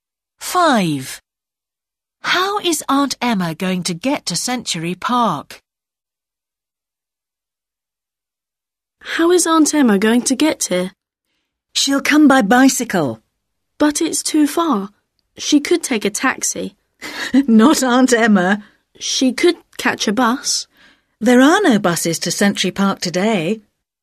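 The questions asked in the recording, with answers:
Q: How is Aunt Emma going to get to Century Park?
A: By bicycle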